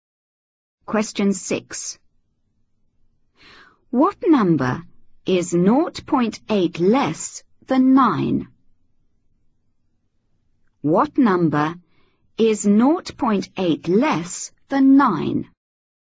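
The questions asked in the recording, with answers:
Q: What number is 0.8 less than 9?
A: 8.2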